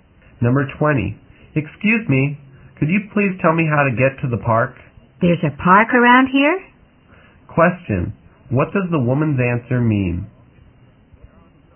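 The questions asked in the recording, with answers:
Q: Question, what does the woman's answer mean?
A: She doesn't know of any park nearby.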